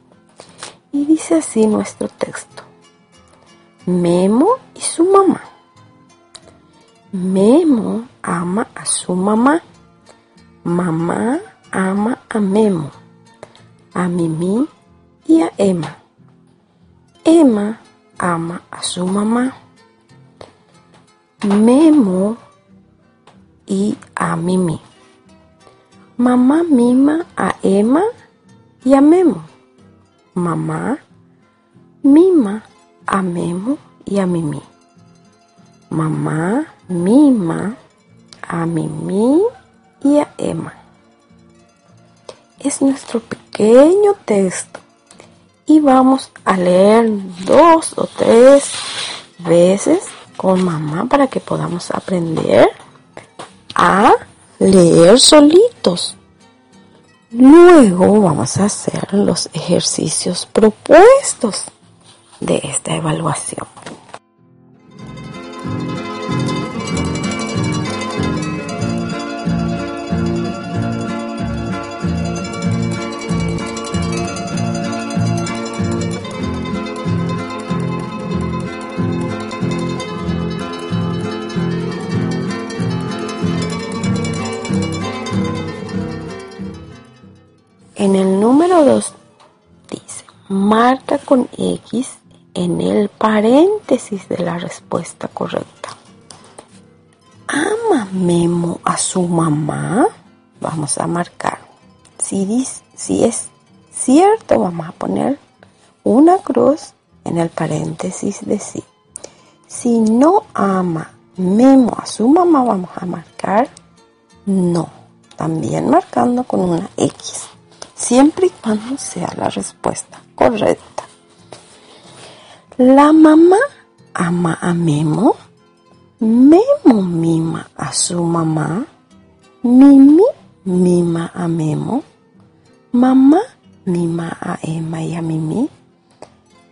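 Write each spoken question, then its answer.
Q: ¿Ama Memo a su mamá?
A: Sí

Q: ¿La mamá ama a Memo?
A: Sí

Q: ¿Mamá mima a Emma y a Mimi?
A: Sí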